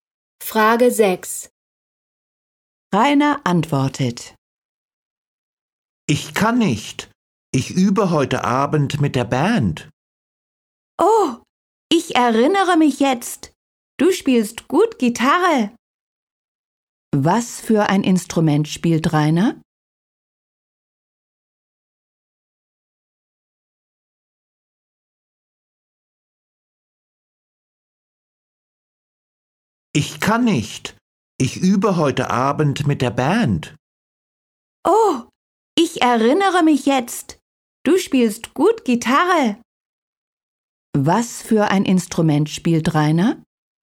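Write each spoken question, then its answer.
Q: Was für ein Instrument spielt Rainer?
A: Gitarre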